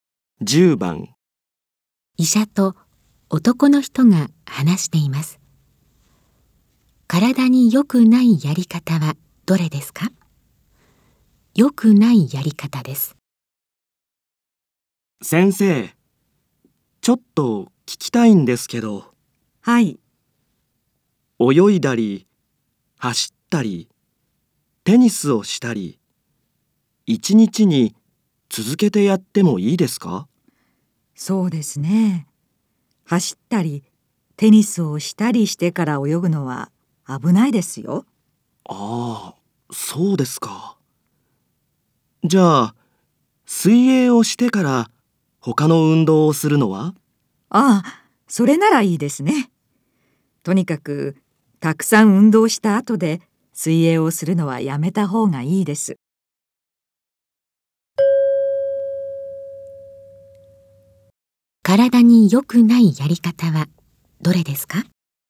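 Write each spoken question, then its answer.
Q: 体に良くないやり方はどれですか?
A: 走ったりテニスをしたりしてから泳ぐこと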